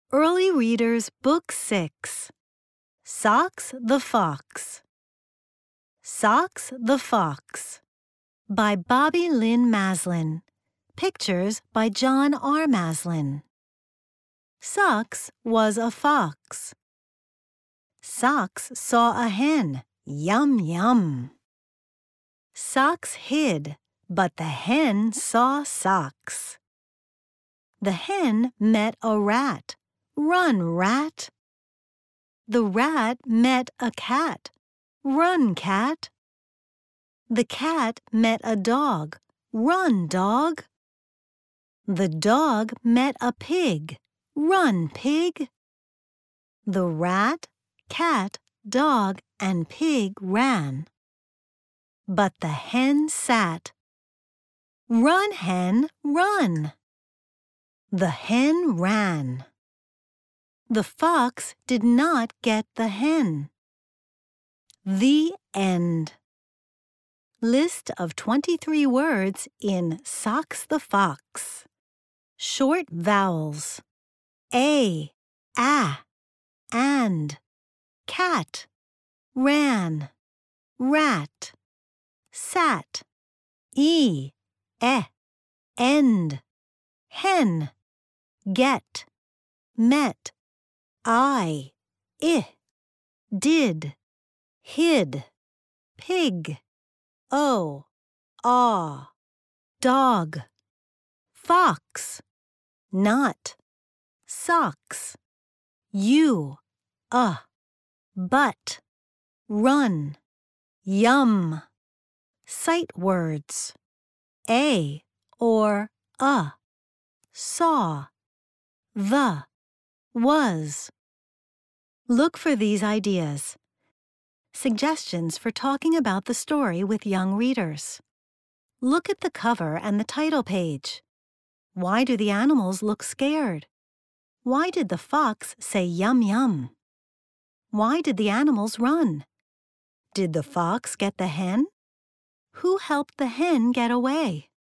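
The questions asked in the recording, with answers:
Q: Did the fox get the hen?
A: No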